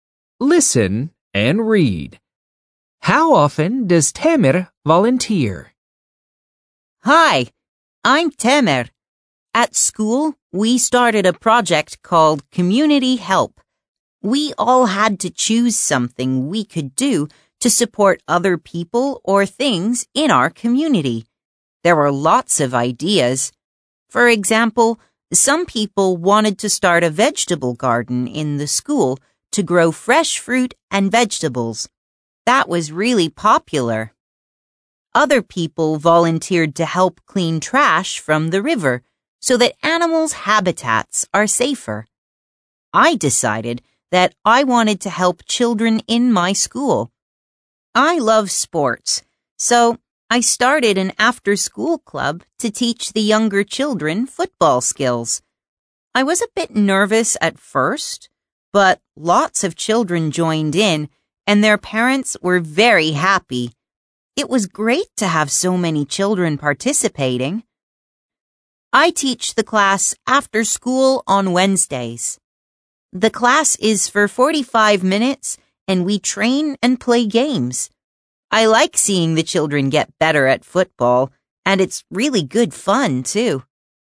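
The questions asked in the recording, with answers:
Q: How often does Tamer volunteer?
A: Once a week, on Wednesdays after school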